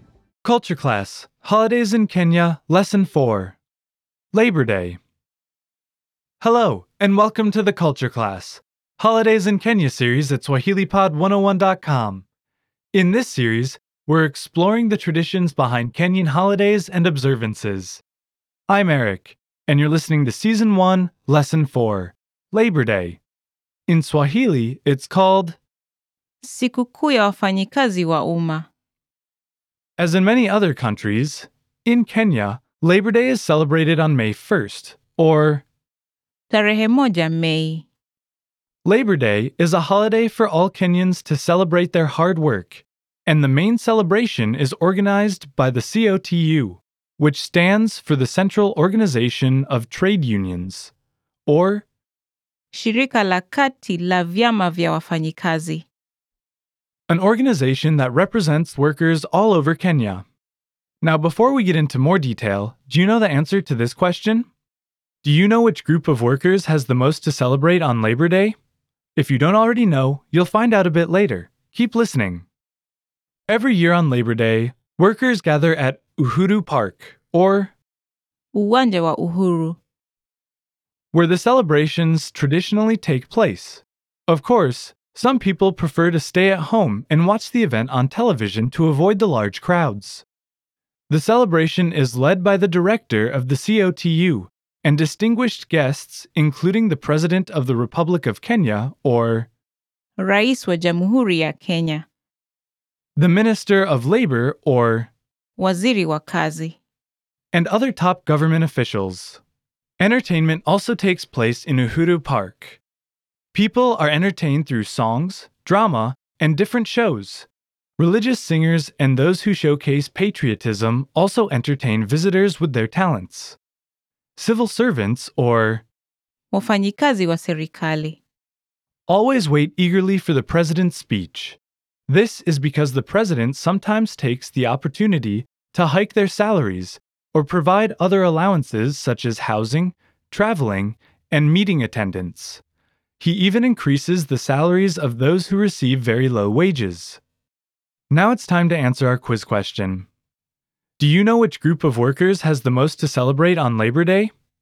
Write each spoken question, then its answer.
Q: Do you know which group of workers has the most to celebrate on Labor Day?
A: Thus, Labor Day is most important for civil servants, who can always take the whole day to rest.